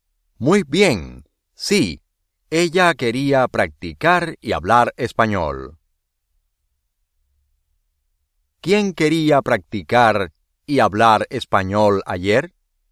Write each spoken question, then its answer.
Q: ¿Quién quería practicar y hablar español ayer?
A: Ana.